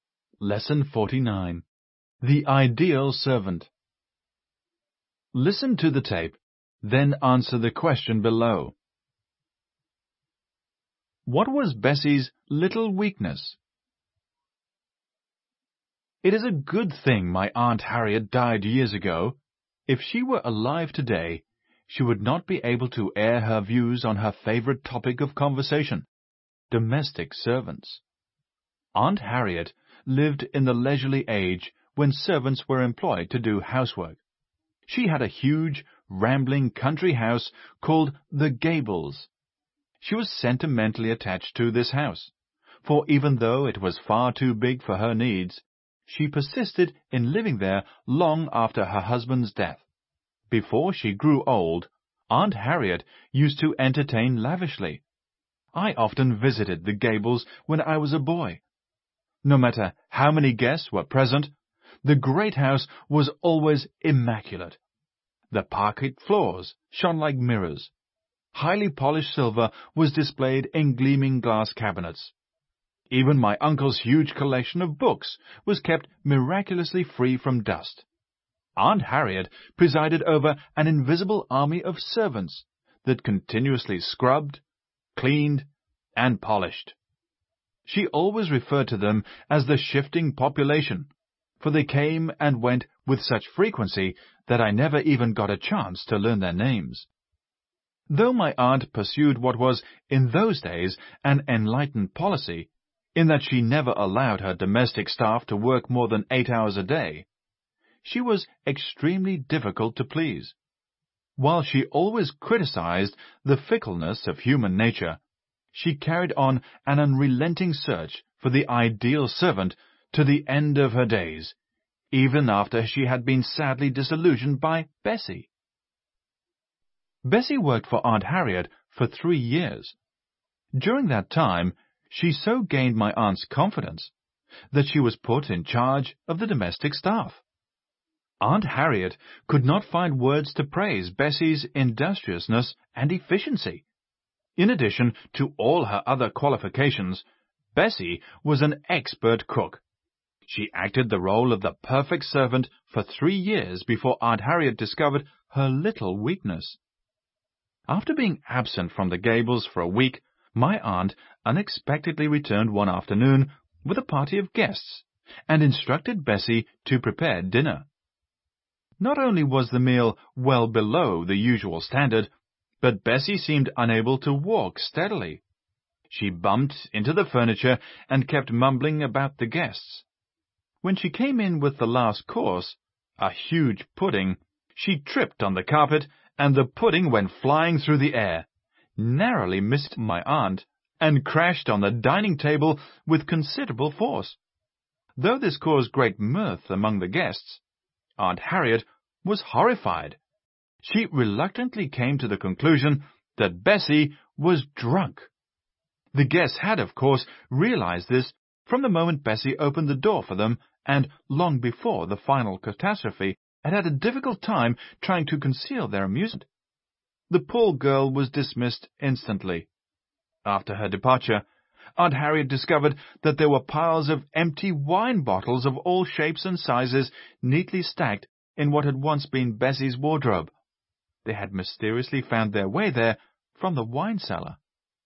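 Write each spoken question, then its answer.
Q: What was Bessie's little weakness?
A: She drank too much (she secretly drank wine from the cellar).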